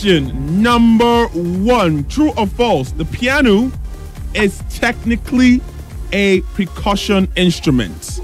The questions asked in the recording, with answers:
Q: True or false? The piano is technically a percussion instrument.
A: True,